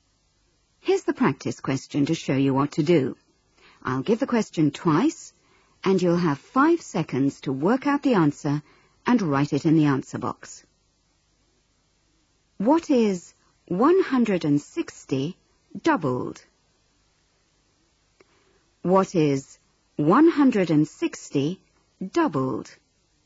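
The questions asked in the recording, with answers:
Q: What is 160 doubled?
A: 320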